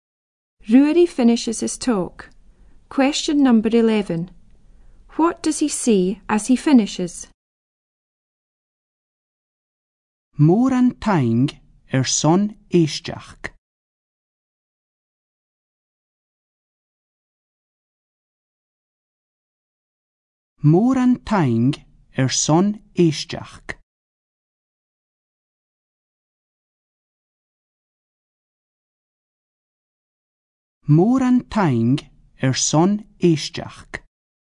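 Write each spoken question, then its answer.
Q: What does he see as he finishes?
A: Thank you very much for listening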